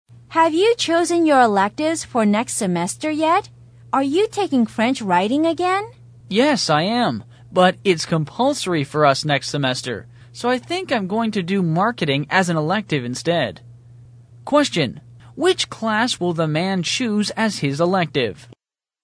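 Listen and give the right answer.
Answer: Marketing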